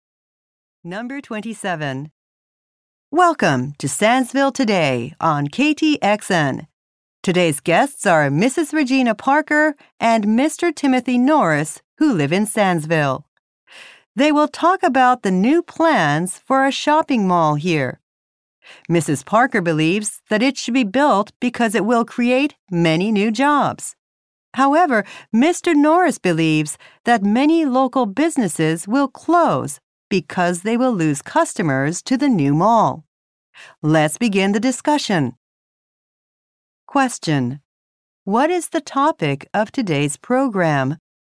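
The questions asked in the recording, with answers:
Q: what is the topic of today's program?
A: Plans for a new shopping mall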